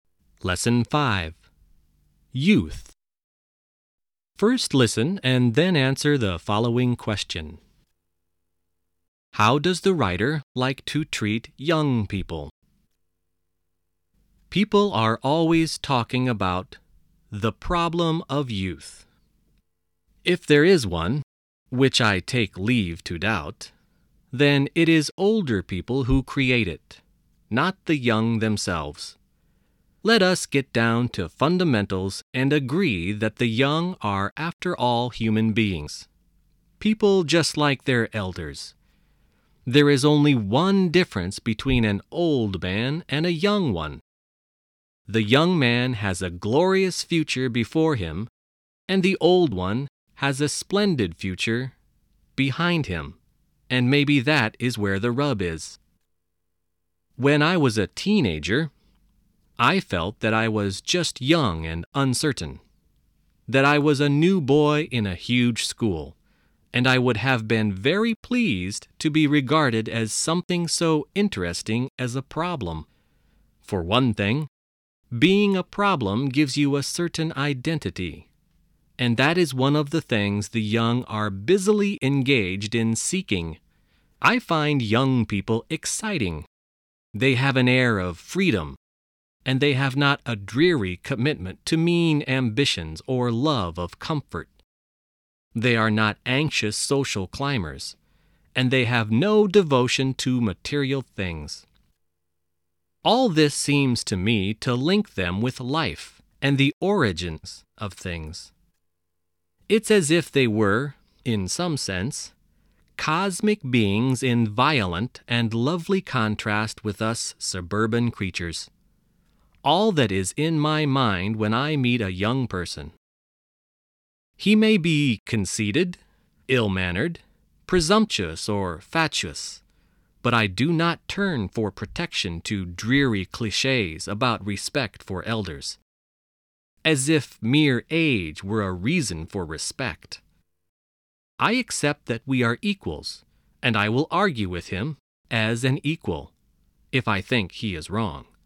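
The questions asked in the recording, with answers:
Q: How does the writer like to treat young people?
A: As equals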